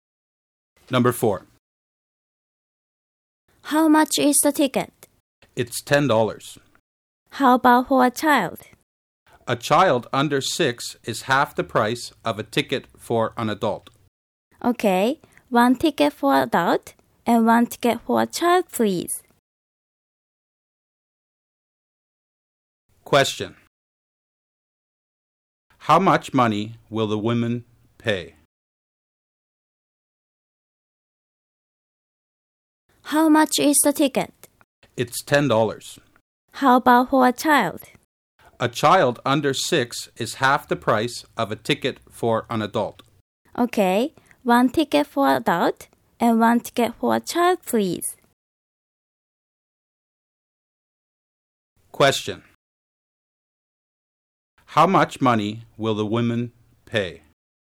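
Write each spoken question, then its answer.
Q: How much money will the women pay?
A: $15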